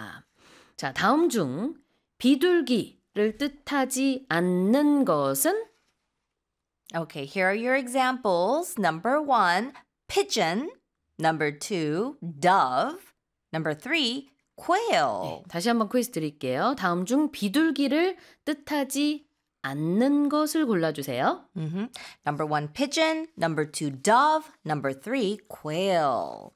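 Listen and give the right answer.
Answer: 3: quail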